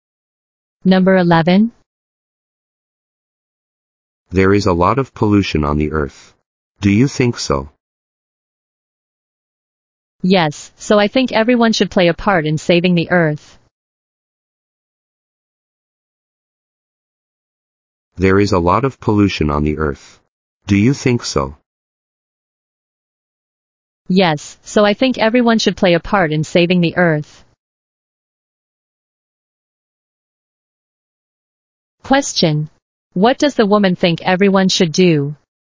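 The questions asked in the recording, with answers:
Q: What does the woman think everyone should do?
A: Play a part in saving the earth.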